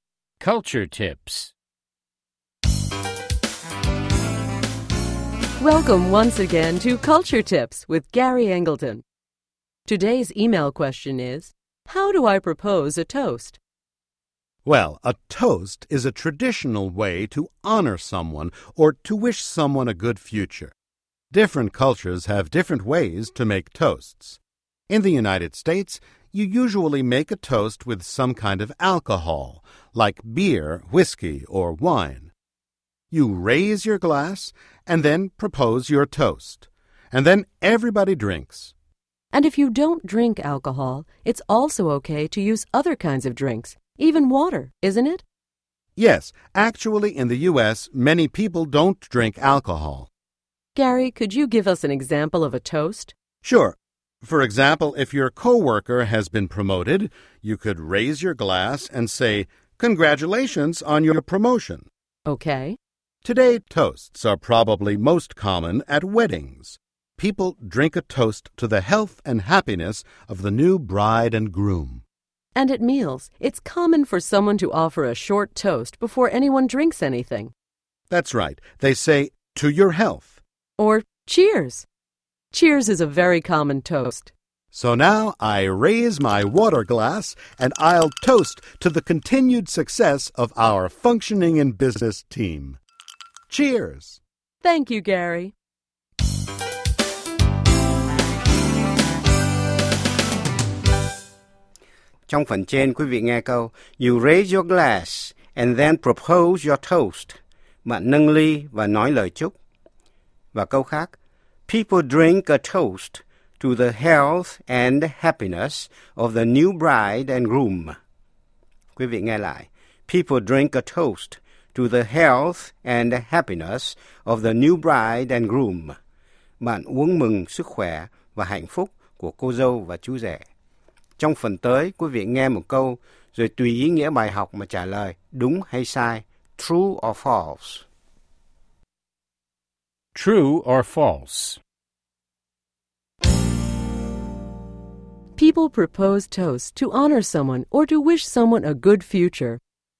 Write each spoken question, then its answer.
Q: People propose toasts to honor someone or to wish someone a good future.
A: True. For example, people drink to good health in the future.